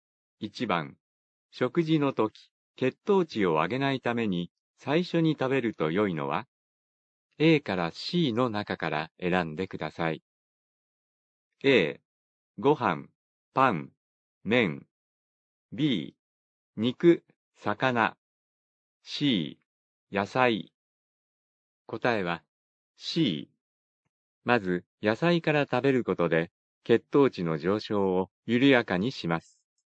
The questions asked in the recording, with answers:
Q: 食事の時、血糖値を上げないために最初に食べると良いのは?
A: 答えは C。